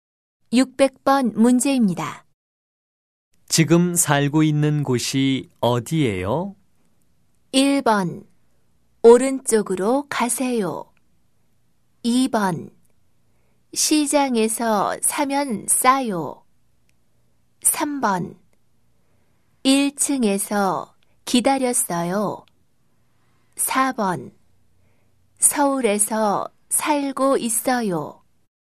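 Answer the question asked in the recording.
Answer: 4: 서울에서 살고 있어요.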